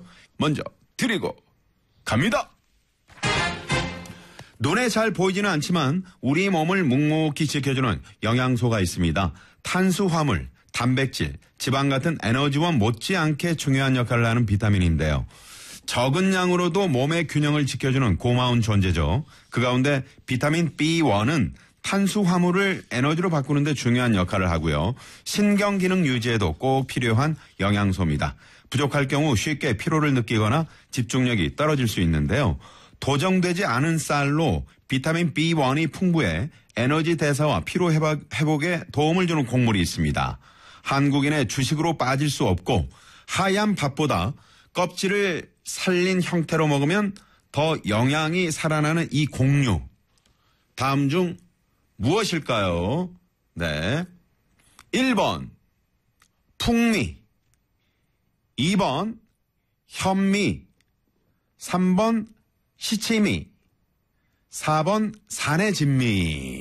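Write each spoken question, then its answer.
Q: 다음 중 무엇일까요? 네. 1번 풍미, 2번 현미, 3번 시치미, 4번 산해진미.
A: 2번: 현미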